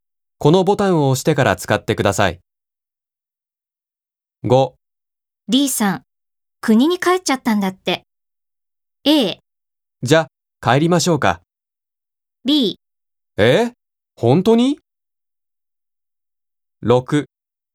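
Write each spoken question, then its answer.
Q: D さん、国に帰っちゃったんだって。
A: B: え?本当に?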